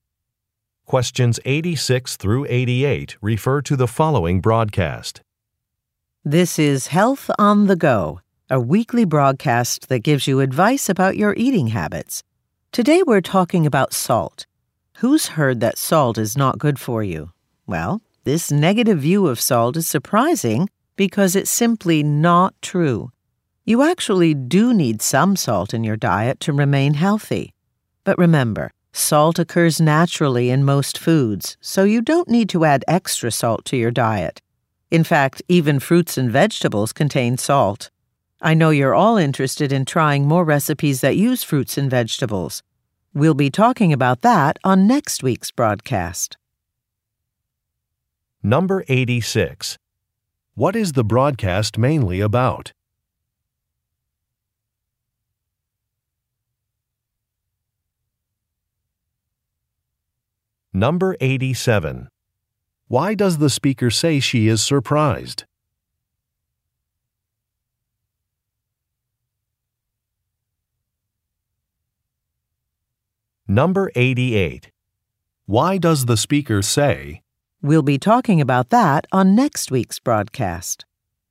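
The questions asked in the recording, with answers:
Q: What is the broadcast mainly about?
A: Salt in your diet

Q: Why does the speaker say she is surprised?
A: Because the negative view of salt is not true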